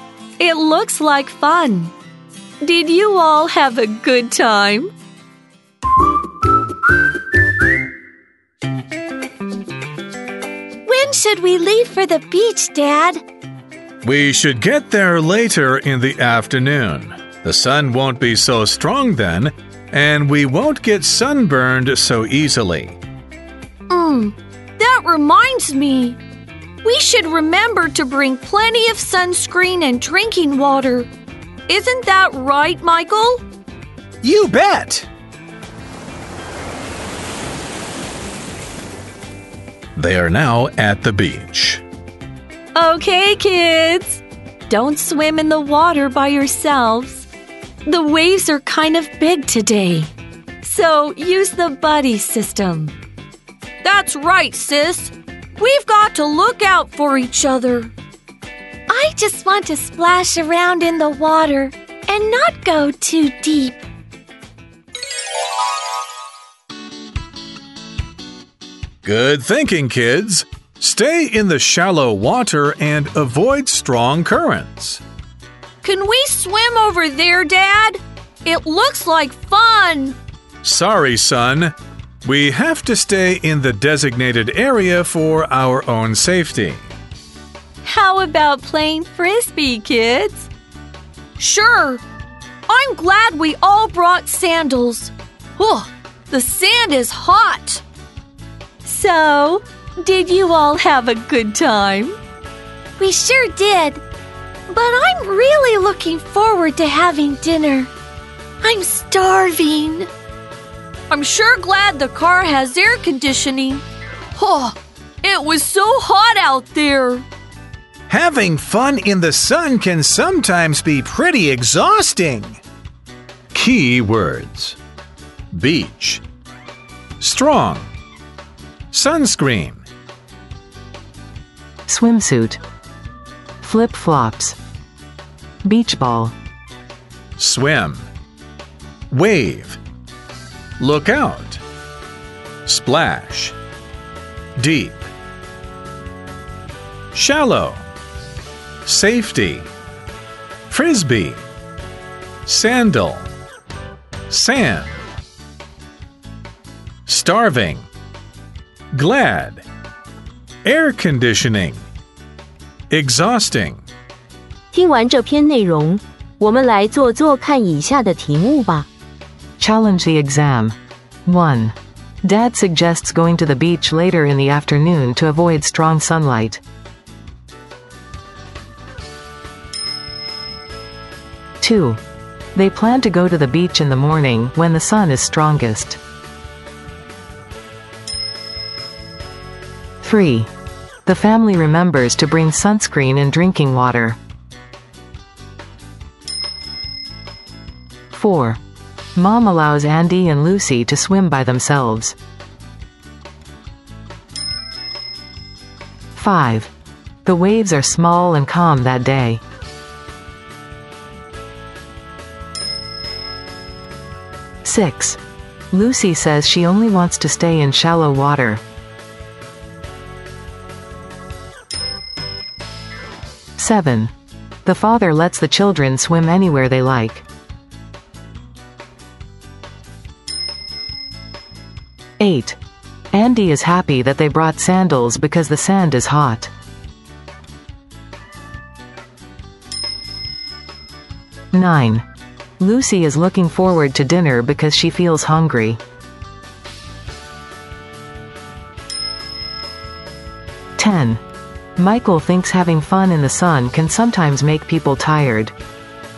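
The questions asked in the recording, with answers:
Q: Dad suggests going to the beach later in the afternoon to avoid strong sunlight.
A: True

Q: They plan to go to the beach in the morning when the sun is strongest.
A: False

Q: The family remembers to bring sunscreen and drinking water.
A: True

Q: Mom allows Andy and Lucy to swim by themselves.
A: False

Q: The waves are small and calm that day.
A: False

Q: The father lets the children swim anywhere they like.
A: False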